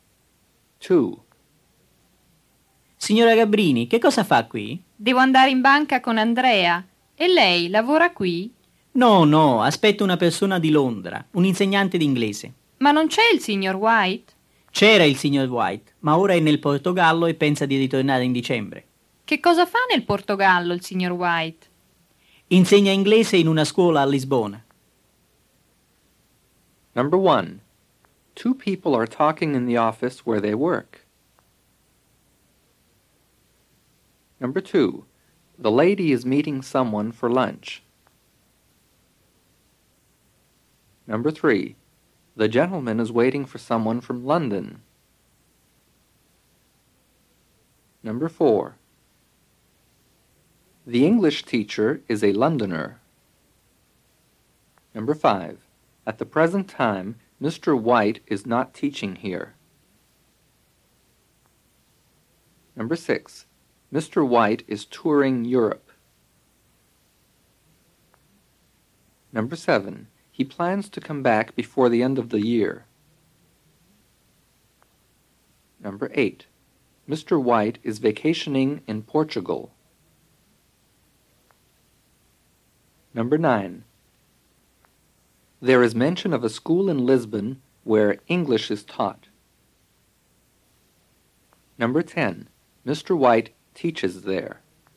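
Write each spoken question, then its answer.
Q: Two people are talking in the office where they work.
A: False

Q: the lady is meeting someone for lunch.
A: False

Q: the gentleman is waiting for someone from London.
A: True

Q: at the present time, Mr. White is not teaching here.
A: True

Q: Mr. White is touring Europe.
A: False

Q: He plans to come back before the end of the year.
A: True

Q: Mr. White is vacationing in Portugal.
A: False

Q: There is mention of a school in Lisbon where English is taught.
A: True

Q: Mr. White teaches there.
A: True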